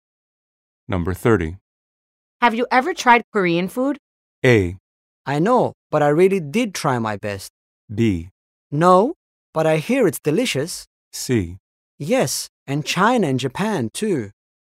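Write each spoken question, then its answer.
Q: Have you ever tried Korean food?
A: B: No, but I hear it's delicious.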